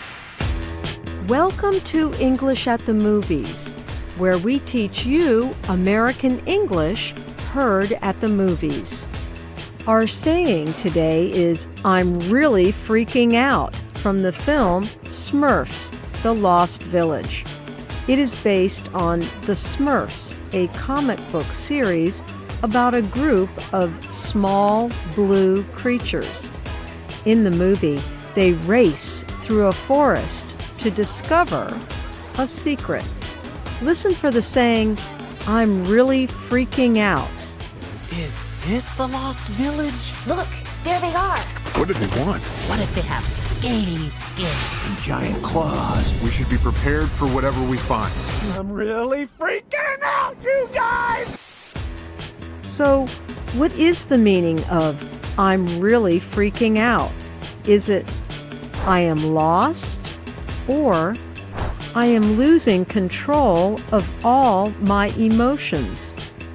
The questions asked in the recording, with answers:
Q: So, what is the meaning of I'm really freaking out?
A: I'm really freaking out means I am losing control of my emotions.